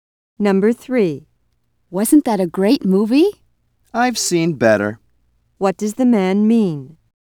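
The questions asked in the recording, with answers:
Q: What does the man mean?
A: He didn't think the movie was great.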